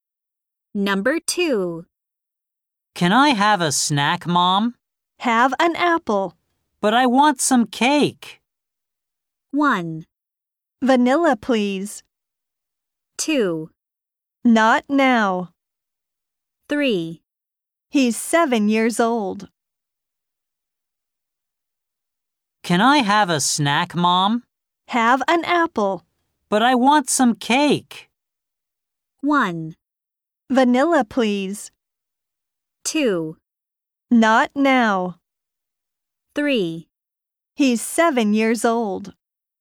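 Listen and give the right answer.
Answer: 2: Not now.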